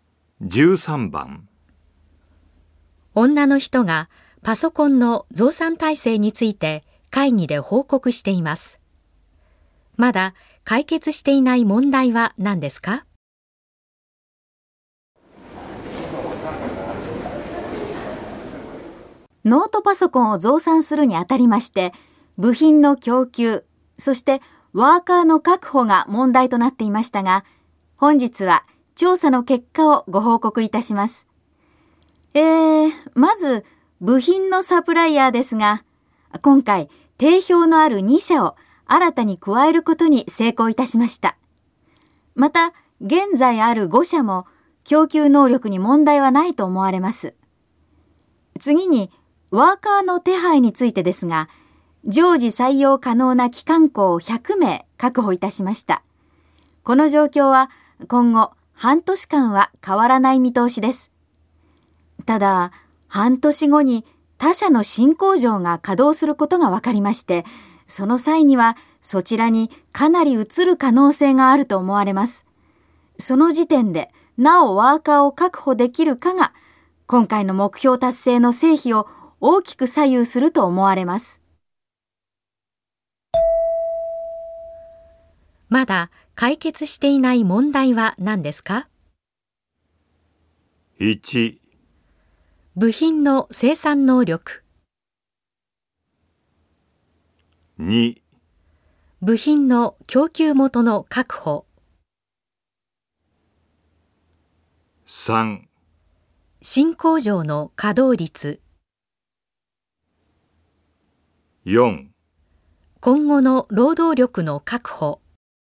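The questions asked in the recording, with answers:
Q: まだ解決していない問題は何ですか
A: 4: 今後の労働力の確保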